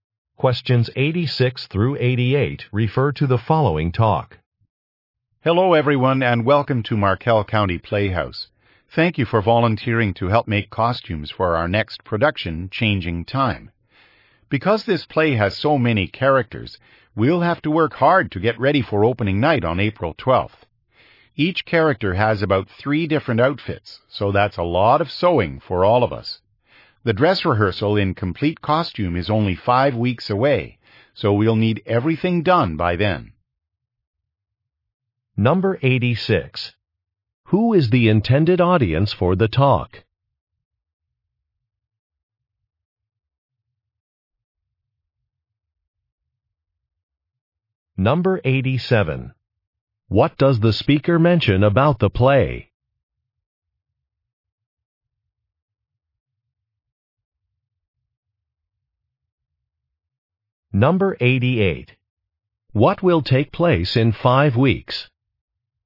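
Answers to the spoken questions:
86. Volunteers making costumes
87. It has many characters
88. The dress rehearsal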